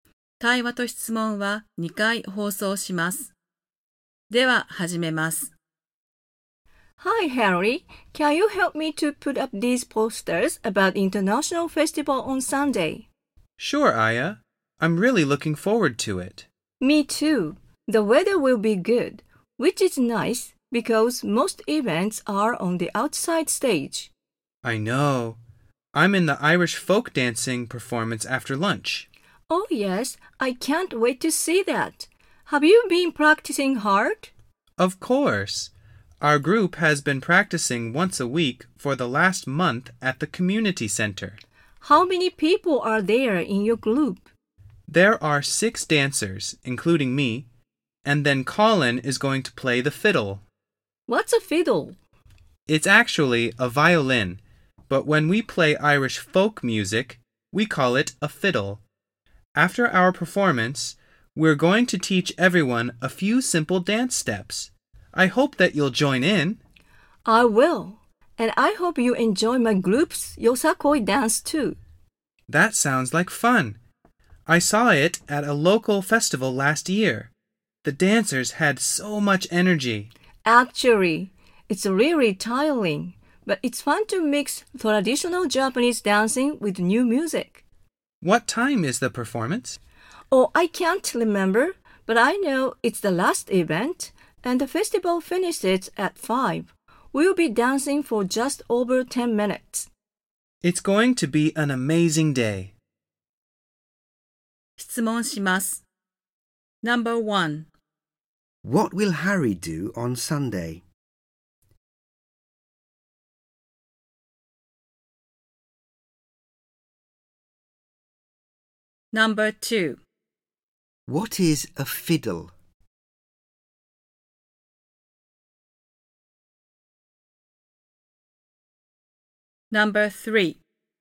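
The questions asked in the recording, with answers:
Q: What will Harry do on Sunday?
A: He will perform Irish folk dancing at the International Festival.

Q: What is a fiddle?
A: A violin, when used to play Irish folk music.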